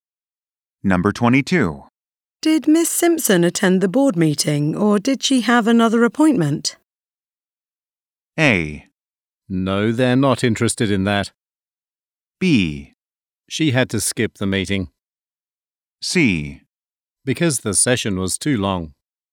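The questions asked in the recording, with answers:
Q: Did Miss Simpson attend the board meeting, or did she have another appointment?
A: B: She had to skip the meeting.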